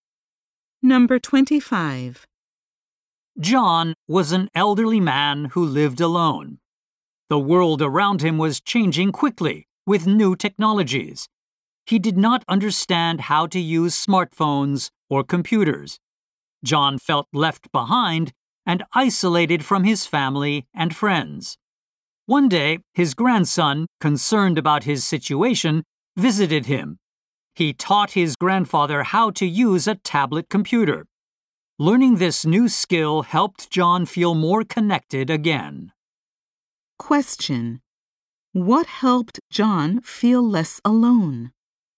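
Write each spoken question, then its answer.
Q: What helped John feel less alone?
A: Learning to use a tablet computer from his grandson.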